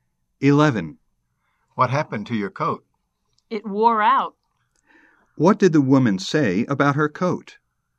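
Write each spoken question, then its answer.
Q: What did the woman say about her coat?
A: It wore out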